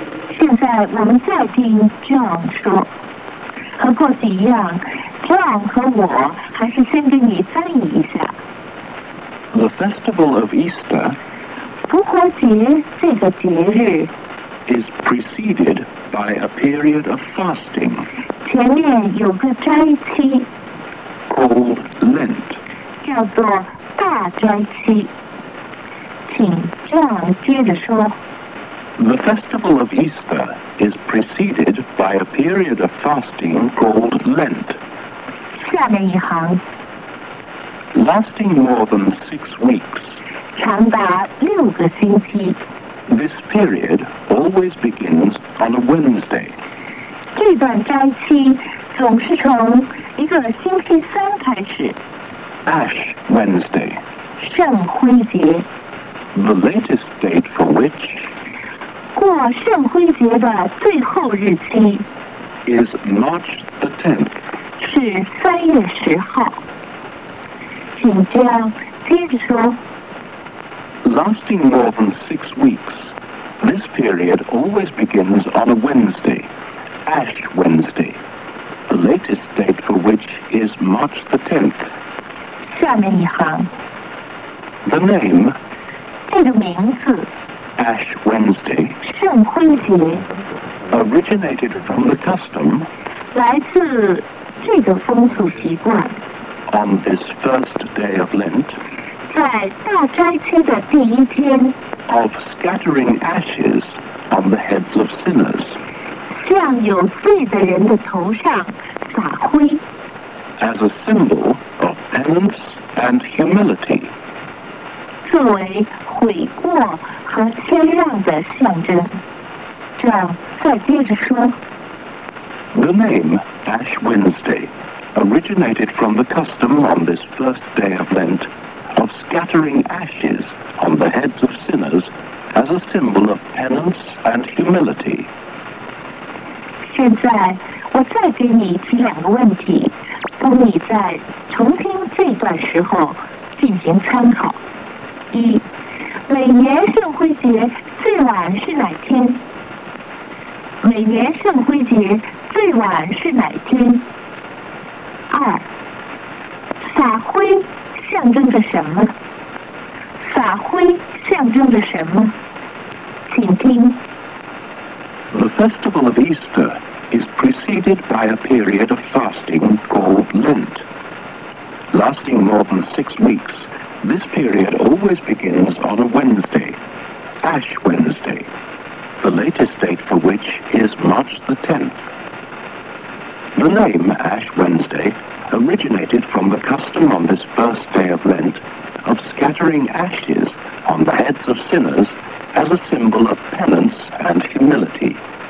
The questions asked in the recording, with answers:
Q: 每年圣灰节最晚是哪天?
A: March the 10th.

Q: 撒灰象征着什么?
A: Penance and humility.